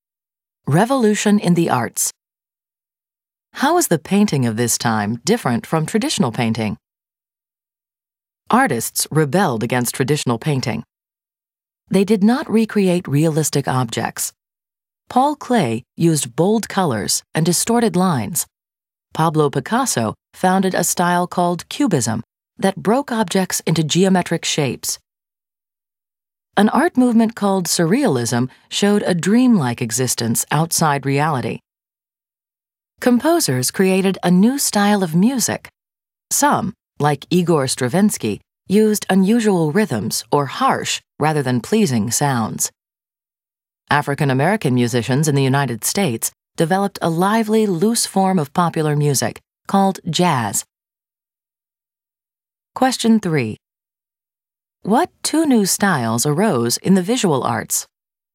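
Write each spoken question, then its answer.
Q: What two new styles arose in the visual arts?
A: Cubism and Surrealism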